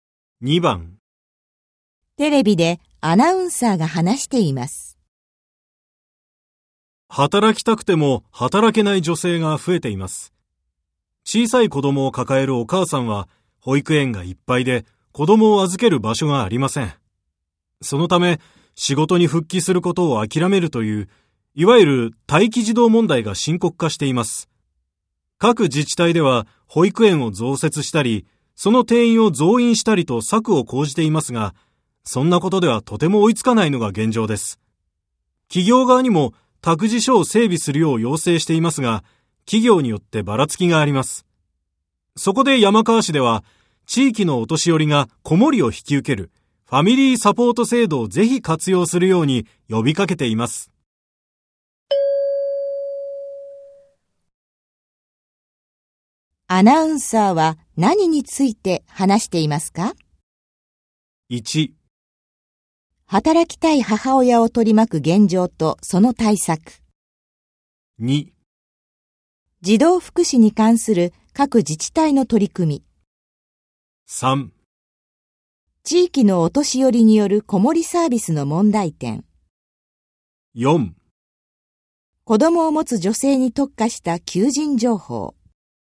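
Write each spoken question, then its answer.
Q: アナウンサーは何について話していますか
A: 1: 働きたい母親を取り巻く現状とその対策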